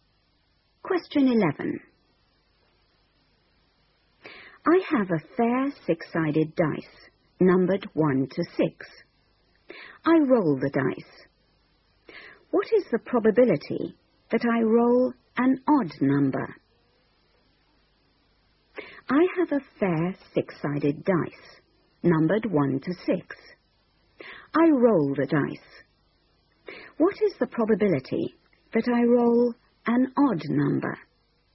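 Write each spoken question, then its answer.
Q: I roll the dice. What is the probability that I roll an odd number?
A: 1/2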